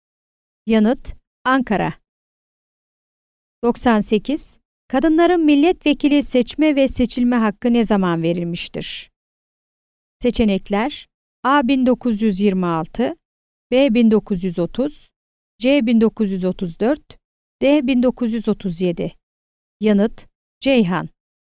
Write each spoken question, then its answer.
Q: Kadınların milletvekili seçme ve seçilme hakkı ne zaman verilmiştir?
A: Yanıt: Ceyhan.